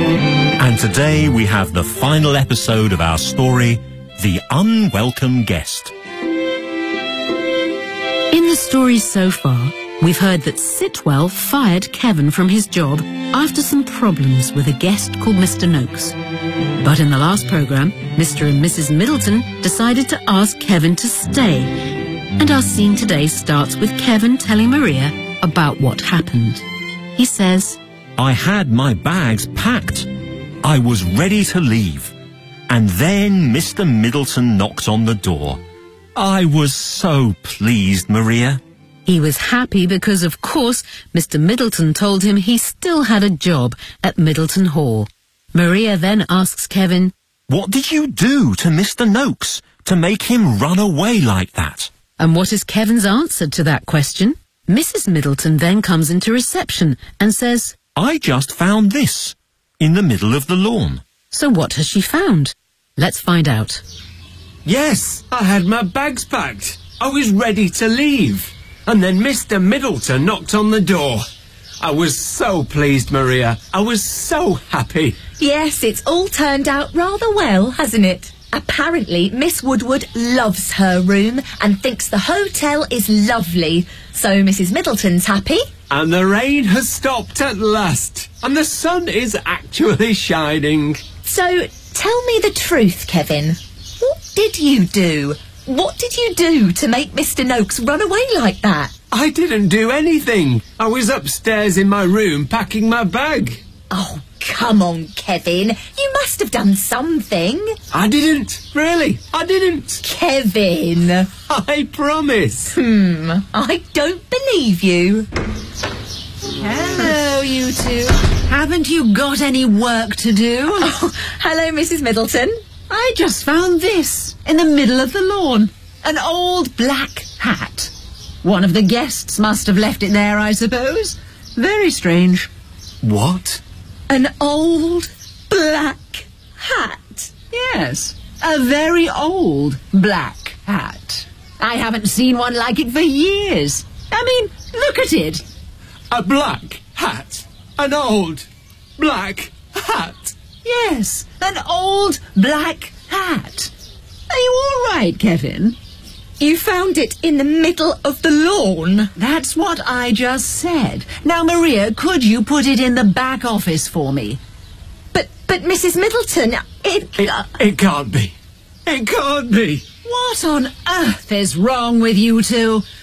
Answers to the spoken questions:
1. I didn't do anything. I was upstairs in my room, packing my bag.
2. An old black hat.